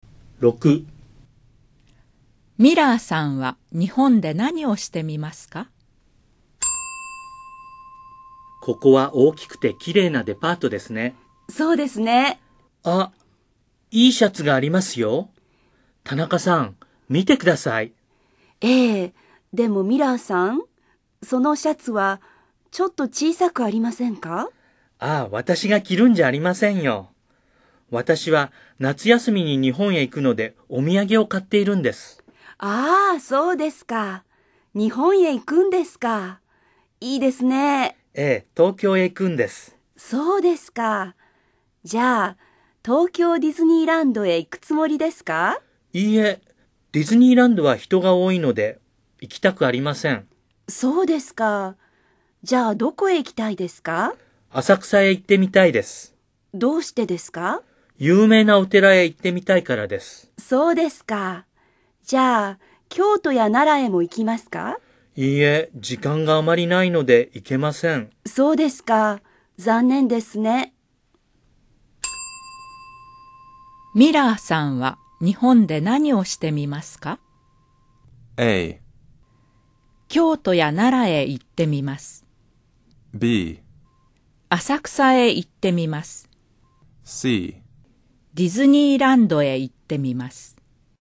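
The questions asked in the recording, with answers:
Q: ミラーさんは日本で何をしてみますか?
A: B: 浅草へ行ってみます。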